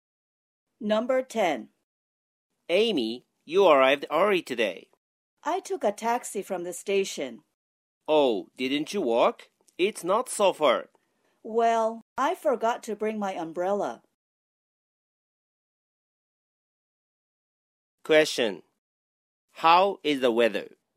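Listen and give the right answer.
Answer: rainy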